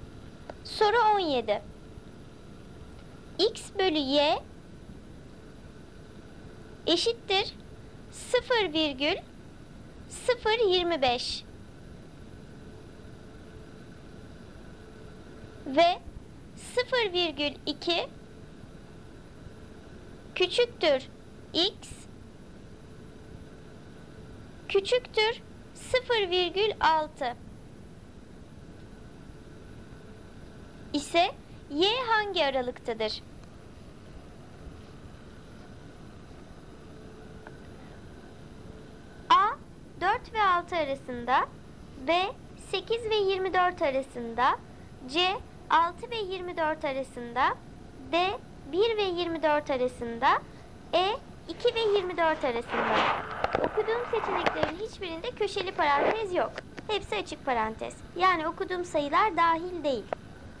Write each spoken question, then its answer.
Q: ise Y hangi aralıktadır?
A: Doğru cevap B 8 ile 24 arasında.